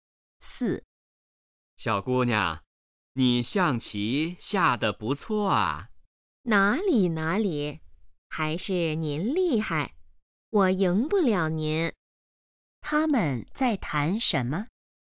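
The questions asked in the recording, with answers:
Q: 他们在谈什么?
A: 下象棋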